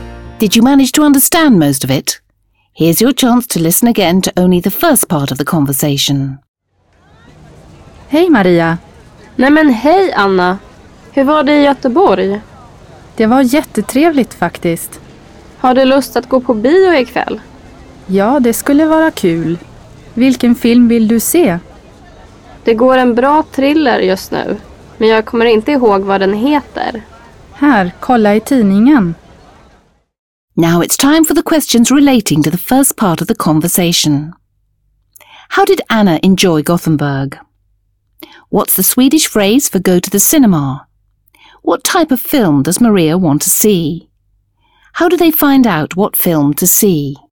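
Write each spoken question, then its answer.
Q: How did Anna enjoy Gothenburg?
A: It was really nice (jättetrevligt)

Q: What's the Swedish phrase for go to the cinema?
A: gå på bio

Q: How do they find out what film to see?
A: They look in the newspaper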